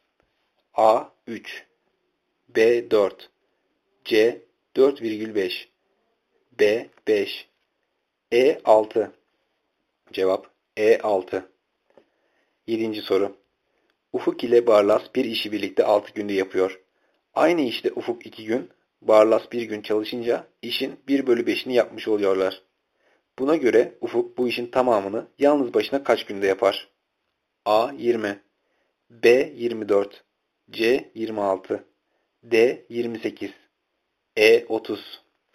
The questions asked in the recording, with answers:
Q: Buna göre Ufuk bu işin tamamını yalnız başına kaç günde yapar?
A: Cevap E şıkkı 30.